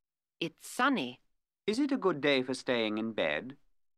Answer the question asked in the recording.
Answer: No, it isn't.